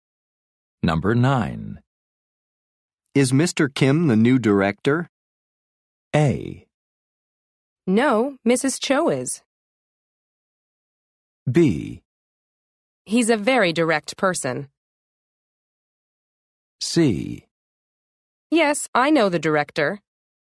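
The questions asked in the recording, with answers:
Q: Is Mr. Kim the new director?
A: A: No, Mrs. Cho is.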